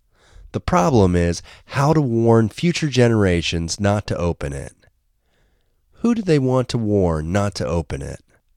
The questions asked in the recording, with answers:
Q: Who do they want to warn not to open it?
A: They want to warn future generations not to open it.